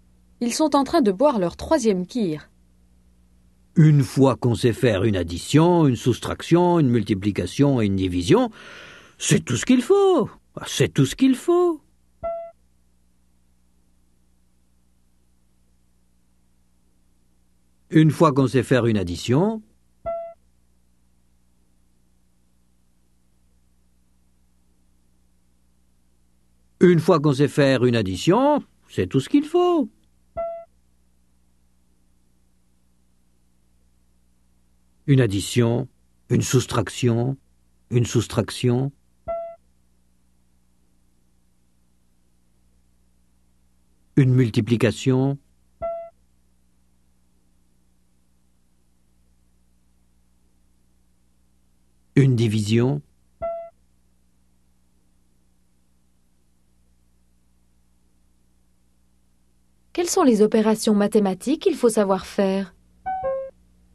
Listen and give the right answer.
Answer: Une addition, une soustraction, une multiplication et une division.